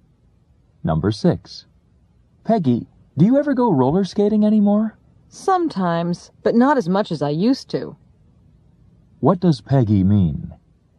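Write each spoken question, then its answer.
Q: What does Peggy mean?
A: She roller skates less often than before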